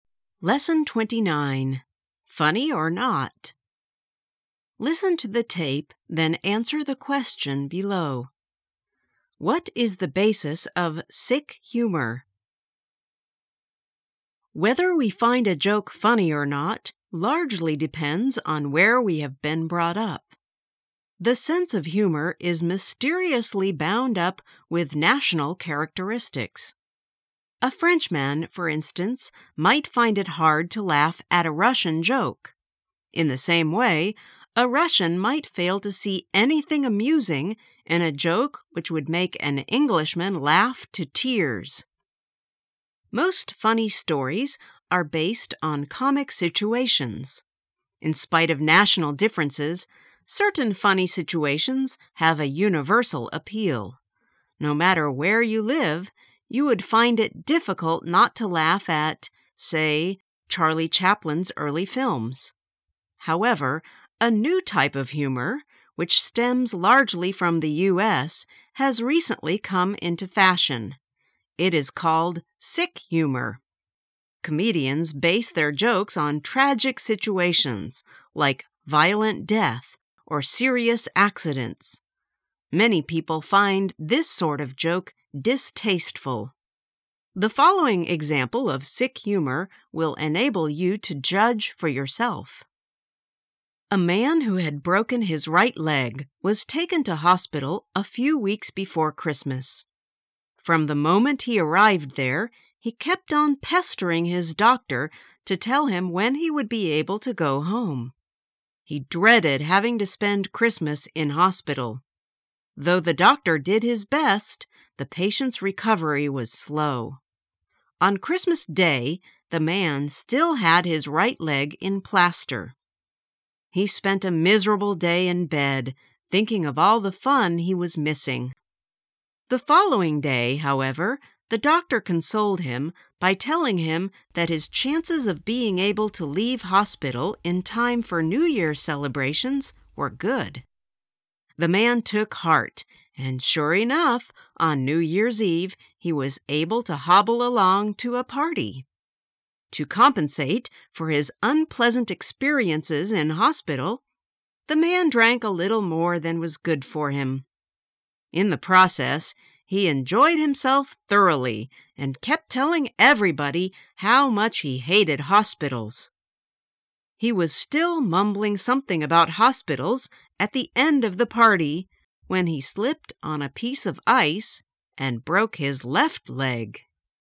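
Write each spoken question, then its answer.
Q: What is the basis of sick humor?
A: Tragic situations, like violent death or serious accidents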